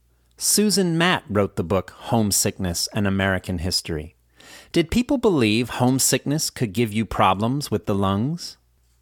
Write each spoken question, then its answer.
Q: Did people believe homesickness could give you problems with the lungs?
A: Yes, people believe that homesickness could give you problems with the lungs.